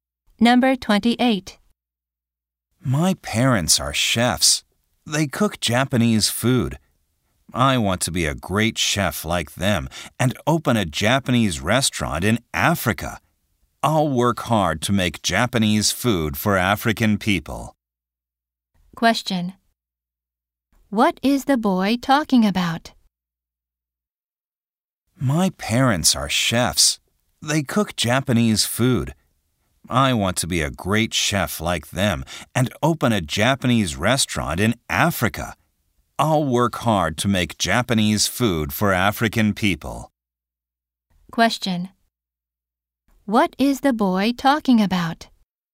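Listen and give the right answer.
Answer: His dream of becoming a chef.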